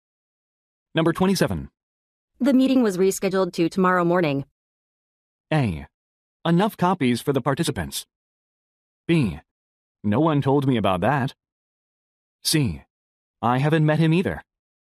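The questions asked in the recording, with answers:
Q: The meeting was rescheduled to tomorrow morning.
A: B: No one told me about that.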